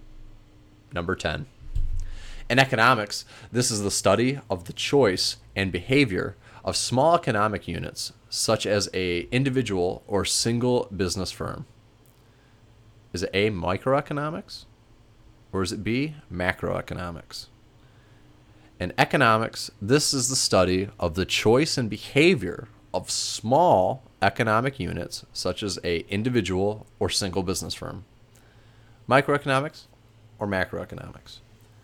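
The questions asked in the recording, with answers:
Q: In economics, this is the study of the choice and behavior of small economic units, such as a individual or single business firm.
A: A: microeconomics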